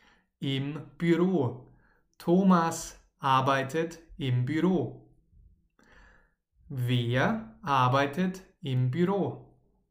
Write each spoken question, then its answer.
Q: Wer arbeitet im Büro?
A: Thomas. Thomas arbeitet im Büro.